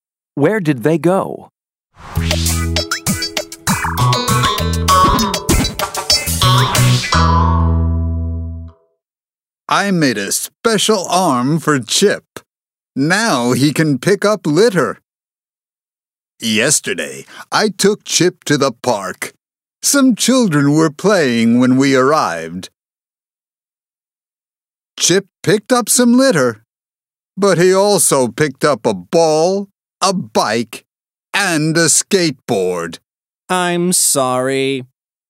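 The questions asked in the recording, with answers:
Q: Where did they go?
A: To the park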